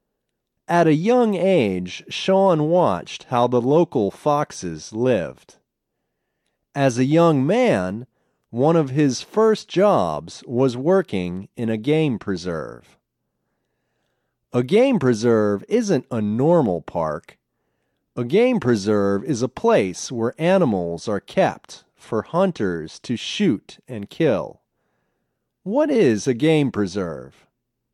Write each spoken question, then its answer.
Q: What is a game preserve?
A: A game preserve is a place where animals are hunted and killed.